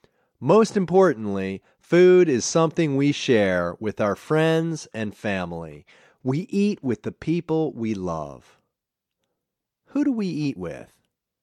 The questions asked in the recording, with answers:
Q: Who do we eat with?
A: We eat with our friends and family.